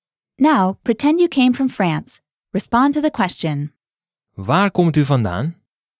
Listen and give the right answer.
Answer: Ik kom uit Frankrijk.